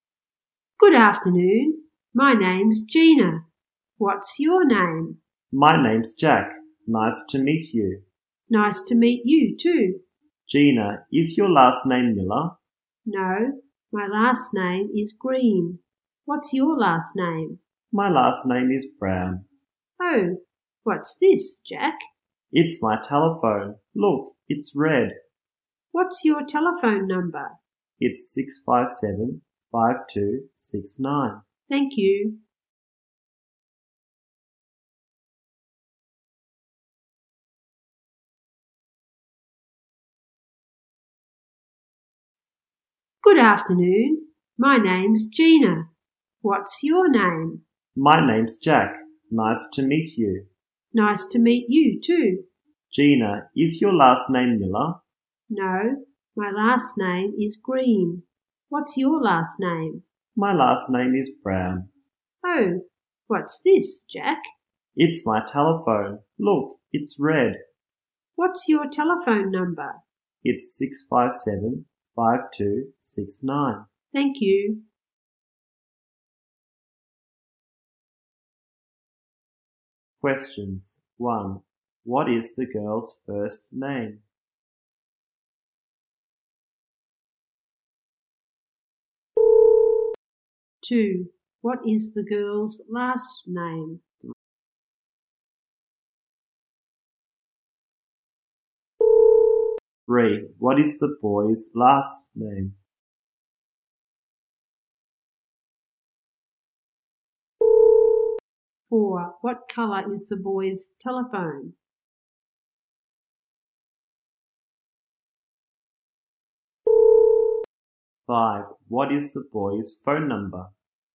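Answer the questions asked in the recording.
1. Gina
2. Green
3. Brown
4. Red
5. 657-5269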